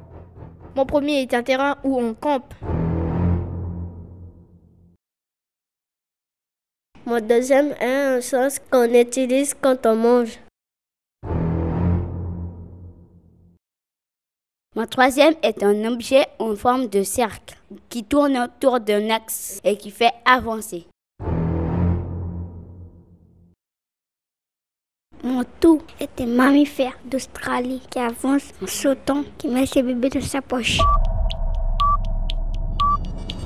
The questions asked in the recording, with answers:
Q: Mon tout est un mammifère d'Australie qui avance en sautant, qui met ses bébés dans sa poche.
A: le kangourou, bien sûr.